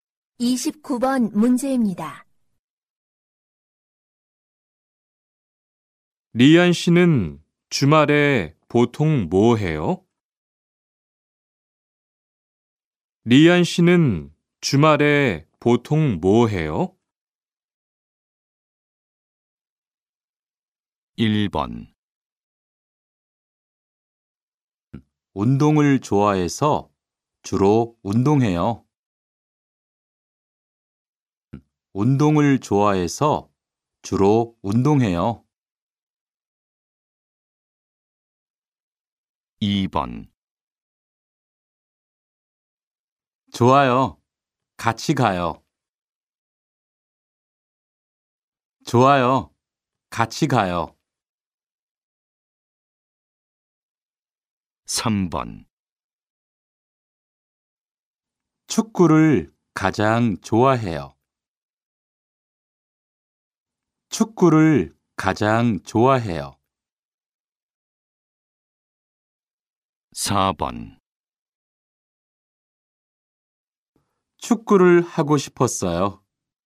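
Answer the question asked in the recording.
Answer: 1: 운동을 좋아해서 주로 운동해요.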